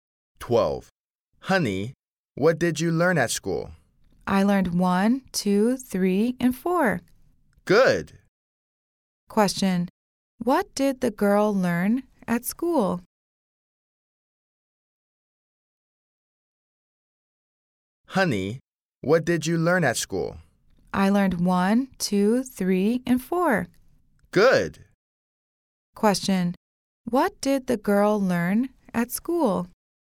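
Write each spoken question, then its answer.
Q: Question. What did the girl learn at school?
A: Numbers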